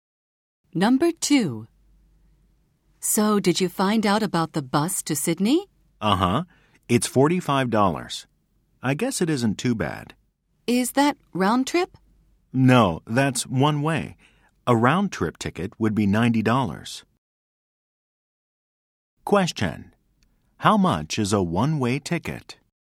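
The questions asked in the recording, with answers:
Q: How much is a one-way ticket?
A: $45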